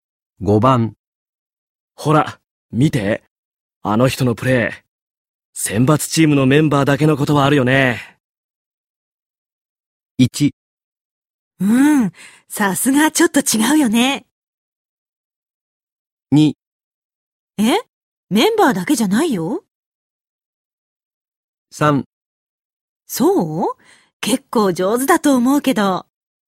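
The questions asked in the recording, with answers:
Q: ほら、見て。あの人のプレイ。選抜チームのメンバーだけのことはあるよね。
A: 1: うん、さすがちょっと違うよね。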